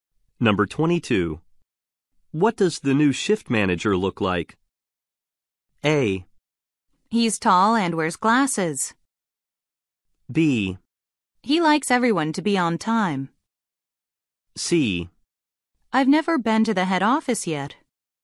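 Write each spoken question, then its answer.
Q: What does the new shift manager look like?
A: A: He's tall and wears glasses.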